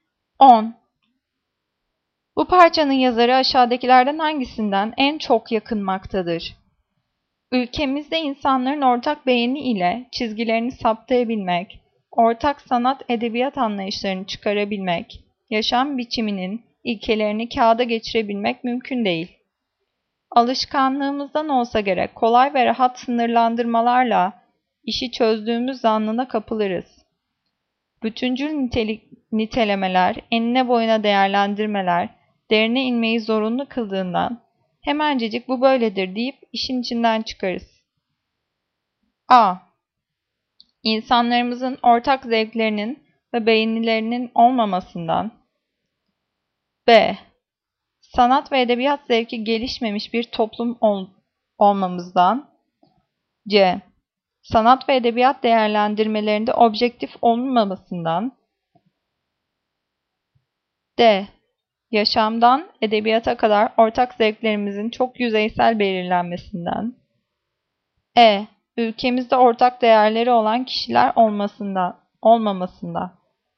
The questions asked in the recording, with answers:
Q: Bu parçanın yazarı aşağıdakilerden hangisinden en çok yakınmaktadır?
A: Cevap D. Yaşamdan edebiyata kadar ortak zevklerimizin çok yüzeysel belirlenmesinden.